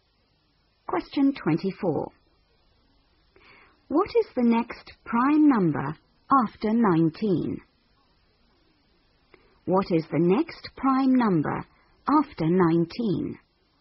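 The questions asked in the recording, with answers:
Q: What is the next prime number after 19?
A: 23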